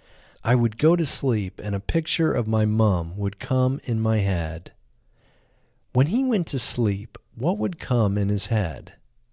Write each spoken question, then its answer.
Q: When he went to sleep, what would come in his head?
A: When he went to sleep, a picture of his mom would come in his head.